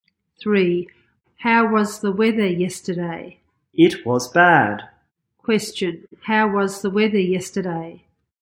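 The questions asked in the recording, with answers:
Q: how was the weather yesterday?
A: It was bad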